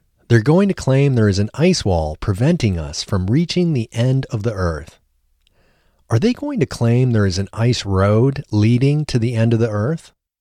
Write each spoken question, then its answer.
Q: Are they going to claim there is an ice road leading to the end of the earth?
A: No, they aren't going to claim there is an ice road leading to the end of the earth.